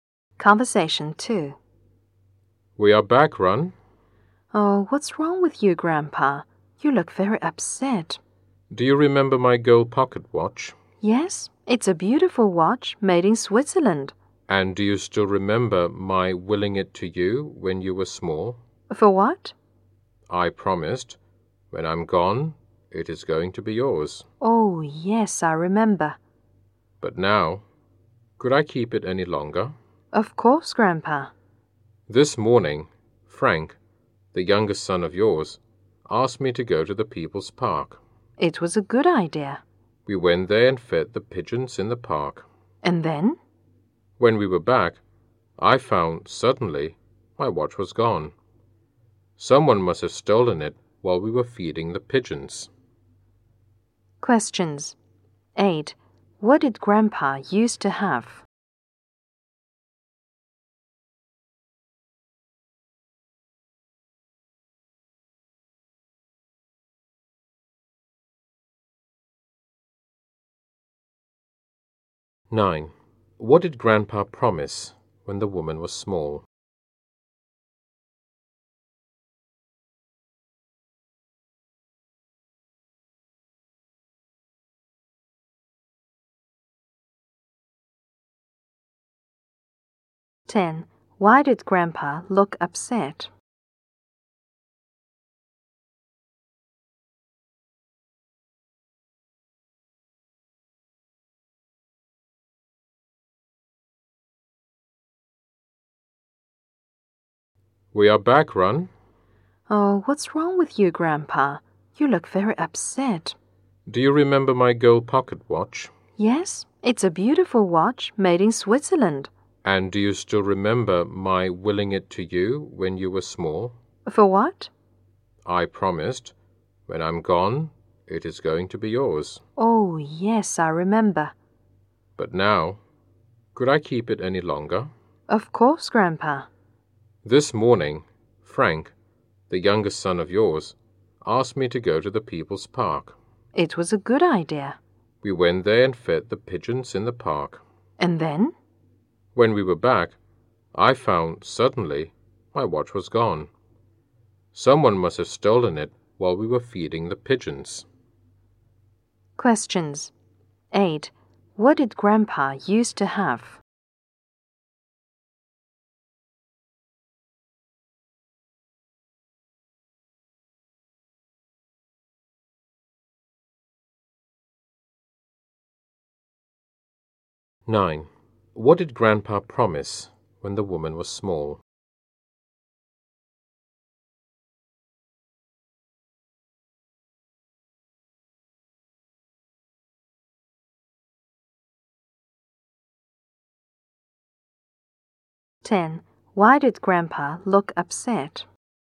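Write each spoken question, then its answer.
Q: What did Grandpa used to have?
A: A gold pocket watch

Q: What did Grandpa promise when the woman was small?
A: To give her his watch when he's gone

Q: Why did Grandpa look upset?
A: His watch was stolen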